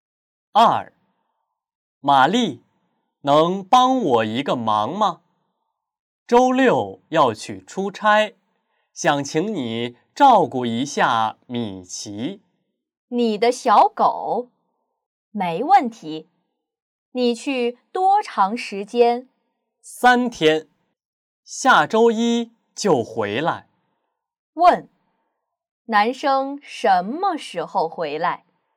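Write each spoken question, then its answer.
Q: 问,男生什么时候回来?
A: 下周一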